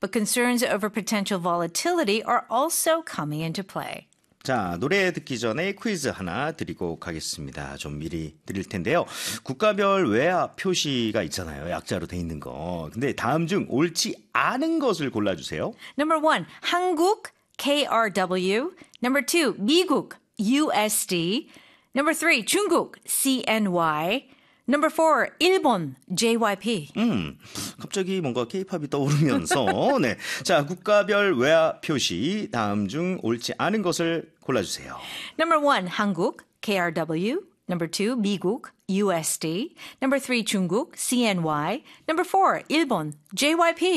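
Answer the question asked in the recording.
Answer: 4: 일본, JYP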